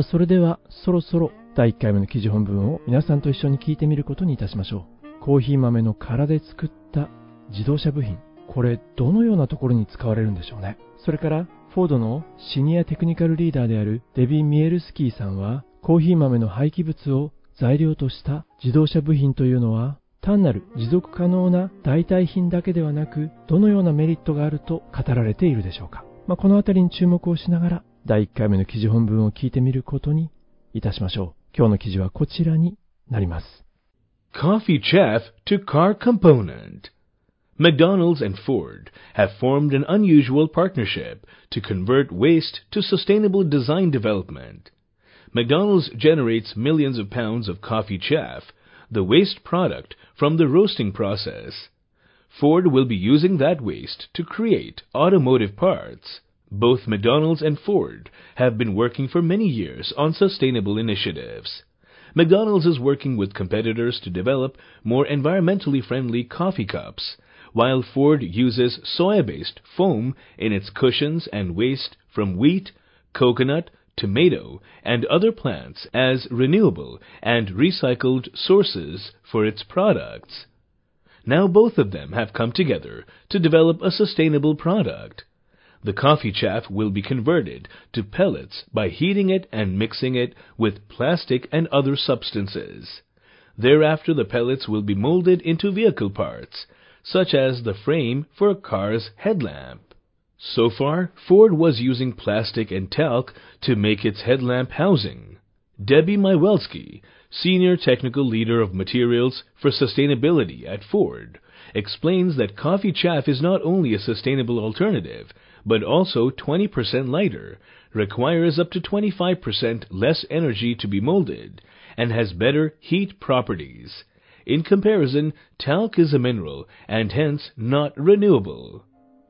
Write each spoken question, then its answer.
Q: コーヒー豆の殻で作った自動車部品、これどのようなところに使われるんでしょうね。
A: 車のヘッドランプのフレームにということなんですけれども